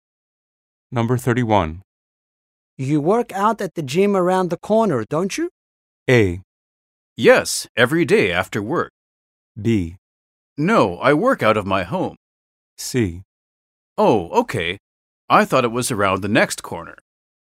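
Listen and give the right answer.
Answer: A: Yes, every day after work.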